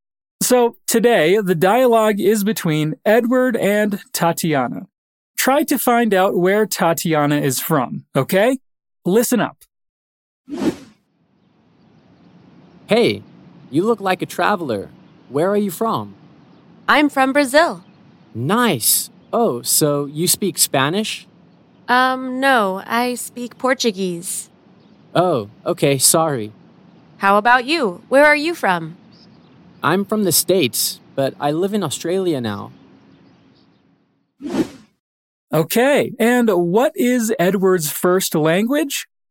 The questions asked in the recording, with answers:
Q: Try to find out where Tatiana is from, okay?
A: Tatiana replies saying, "I'm from Brazil."